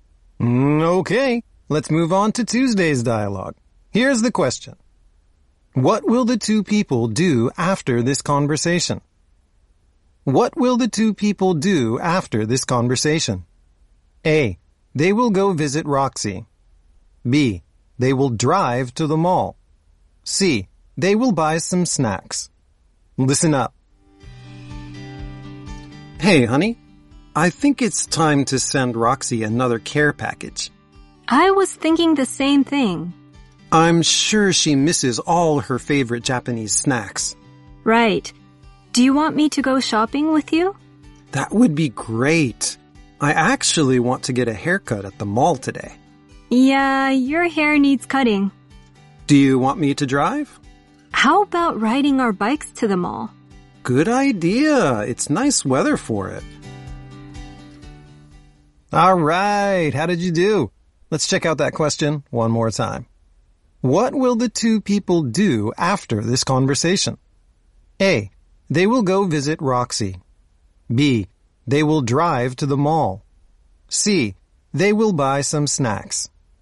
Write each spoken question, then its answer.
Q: What will the two people do after this conversation?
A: C. They will buy some snacks.